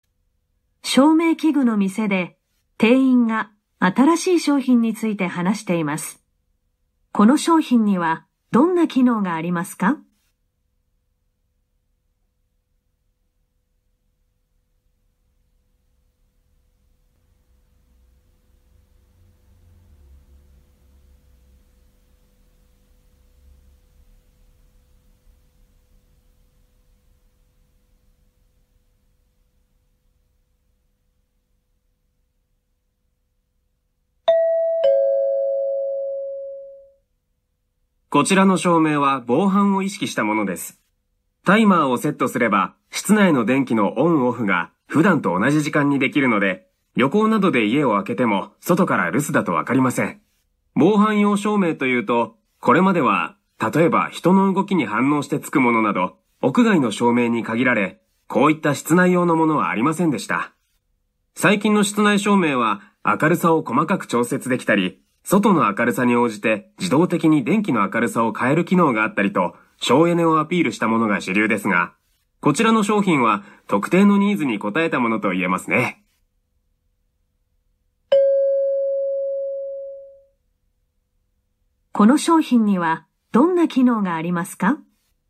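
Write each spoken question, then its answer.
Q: この商品にはどんな機能がありますか?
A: タイマーで室内の電気を普段と同じ時間にオンオフでき、留守だとわからないようにする機能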